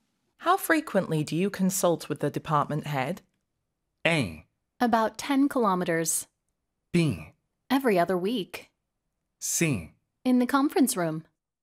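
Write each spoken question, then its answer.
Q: How frequently do you consult with the department head?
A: B: Every other week.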